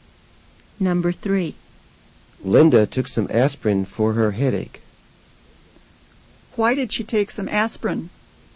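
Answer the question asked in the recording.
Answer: For her headache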